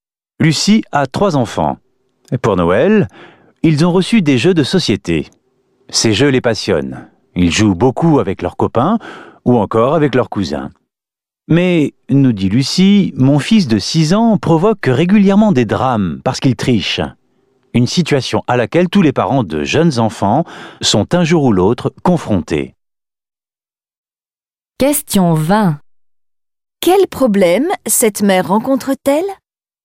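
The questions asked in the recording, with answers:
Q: Quel problème cette mère rencontre-t-elle ?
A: Son fils de 6 ans triche aux jeux de société, ce qui provoque des drames.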